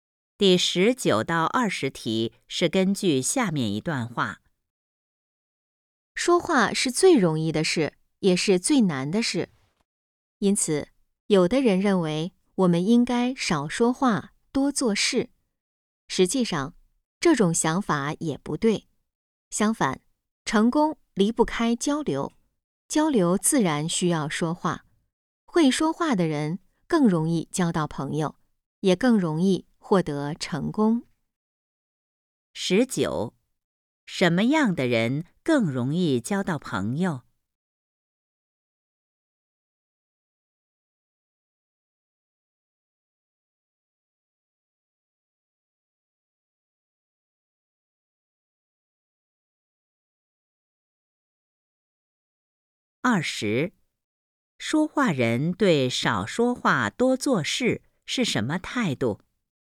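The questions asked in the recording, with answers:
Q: 什么样的人更容易交到朋友?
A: 会说话的人

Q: 说话人对少说话多做事是什么态度?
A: 不同意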